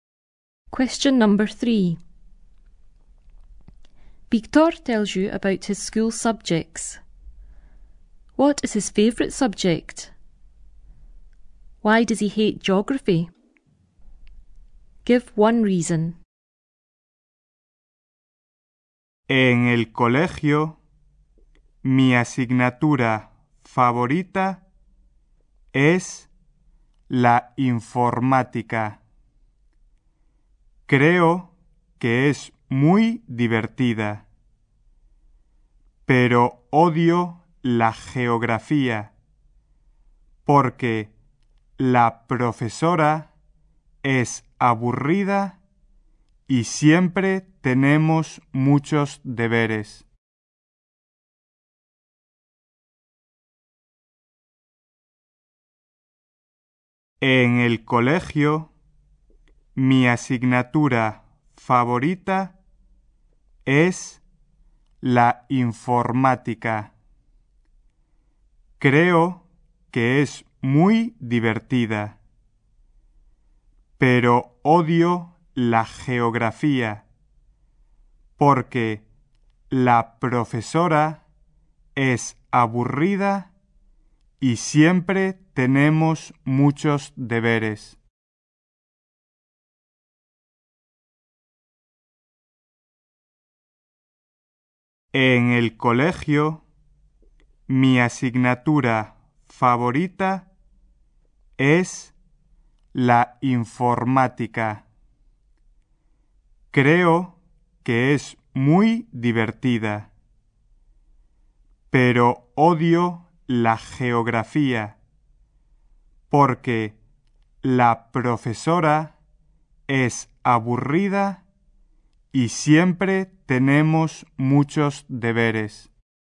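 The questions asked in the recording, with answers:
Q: What is his favourite subject?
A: Computing (informática)

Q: Why does he hate geography?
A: The teacher is boring / they always have lots of homework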